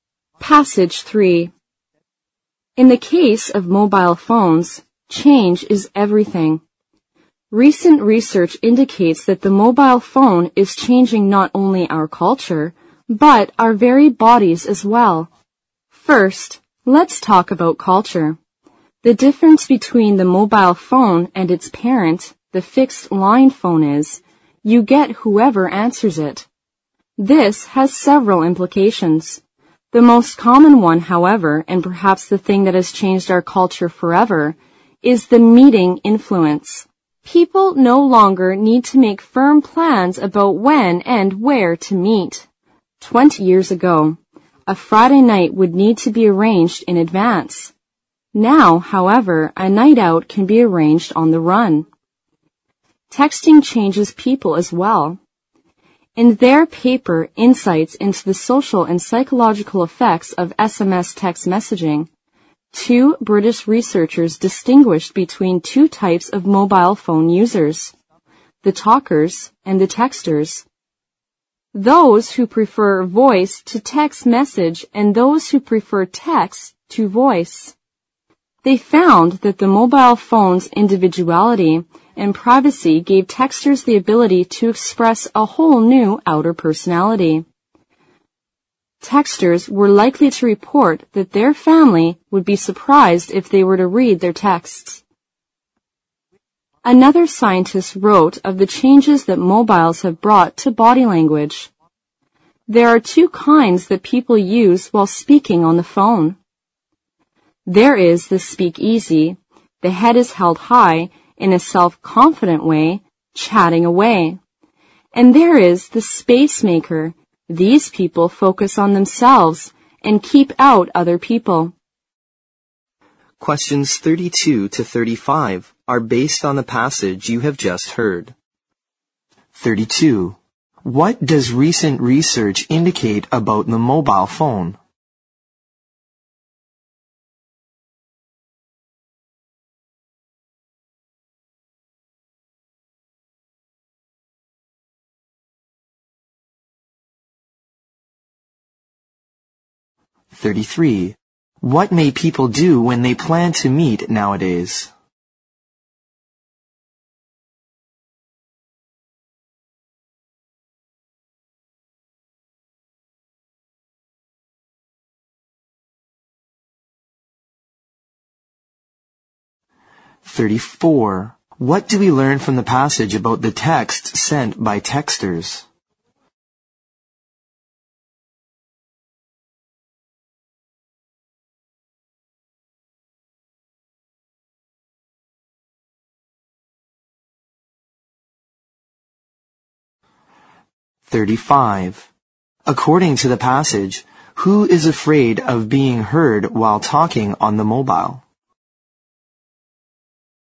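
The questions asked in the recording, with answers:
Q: What does recent research indicate about the mobile phone?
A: It is changing our culture and even our bodies.

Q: What may people do when they plan to meet nowadays?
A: Arrange it on the run instead of making firm plans in advance.

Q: What do we learn from the passage about the text sent by texters?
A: Their families would be surprised to read them, because they show a new outer personality.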